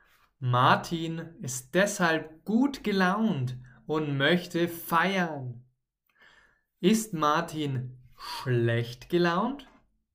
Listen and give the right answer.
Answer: Nein, nein, nein, nein, nein.